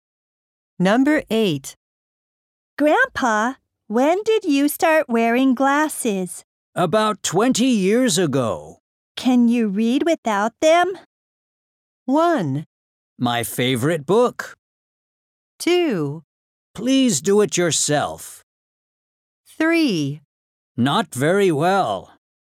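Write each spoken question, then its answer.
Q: Can you read without them?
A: 3: Not very well.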